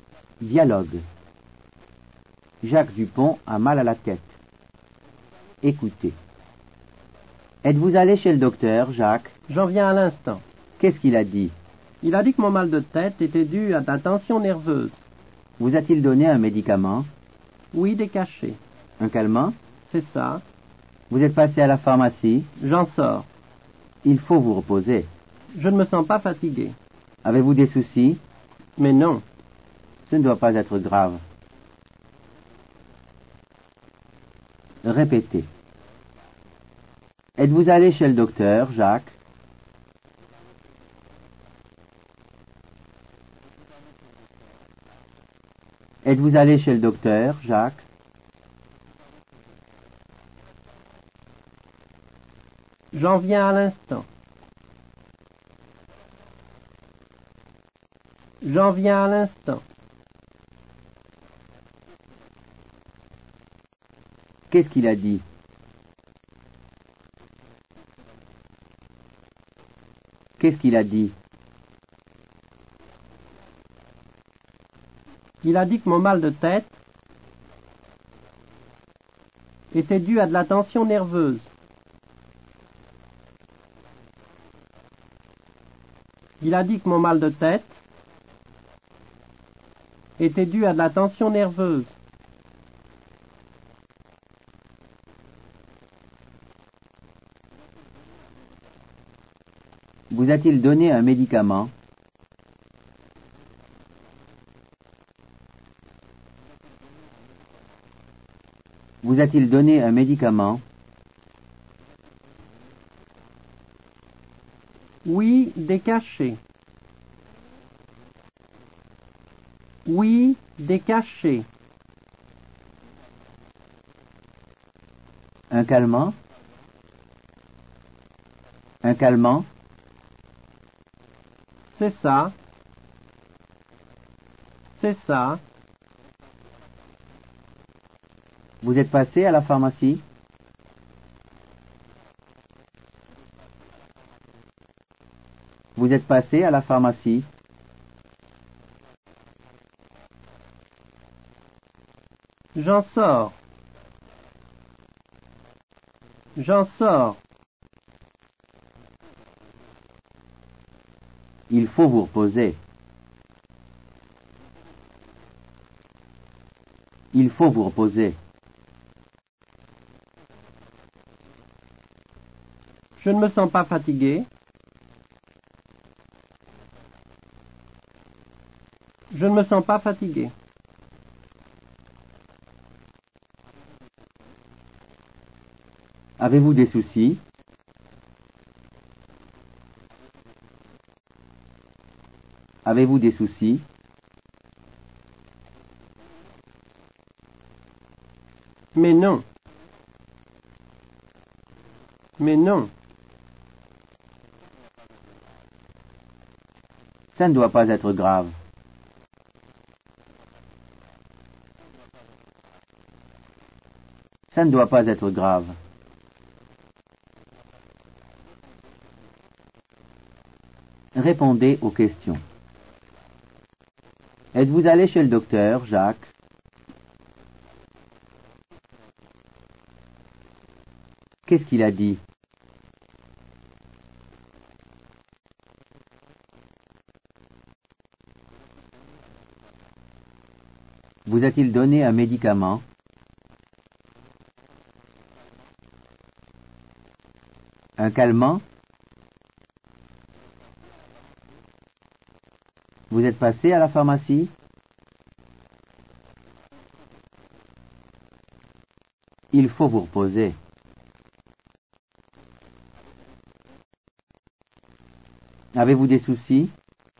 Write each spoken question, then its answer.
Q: Êtes-vous allé chez le docteur, Jacques?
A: J'en viens à l'instant.

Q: Qu'est-ce qu'il a dit?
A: Il a dit que mon mal de tête était dû à de la tension nerveuse.

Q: Vous a-t-il donné un médicament?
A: Oui, des cachets.

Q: Un calmant?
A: C'est ça.

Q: Vous êtes passé à la pharmacie?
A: J'en sors.

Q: Avez-vous des soucis?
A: Mais non.